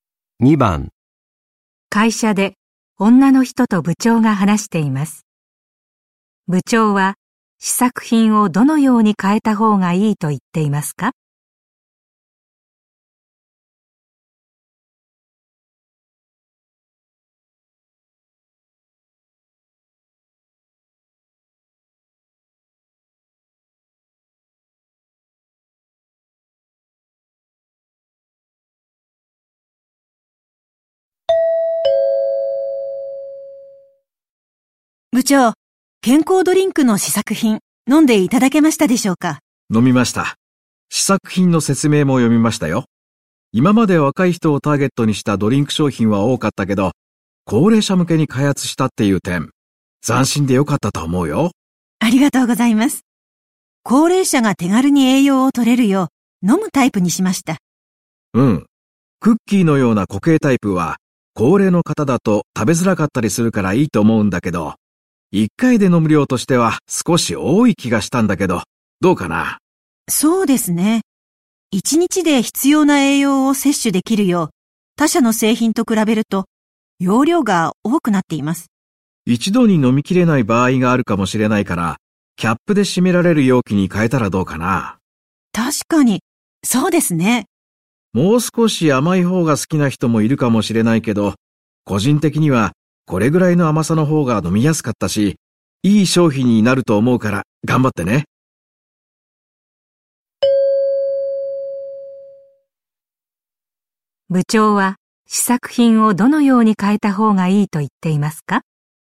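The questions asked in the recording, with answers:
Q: 部長は試作品をどのように変えた方がいいと言っていますか?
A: キャップで閉められる容器に変える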